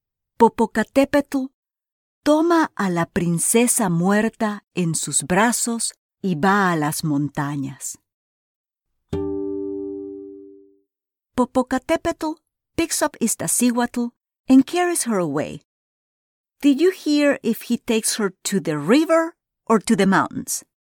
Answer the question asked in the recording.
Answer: Correcto. He goes to the mountains.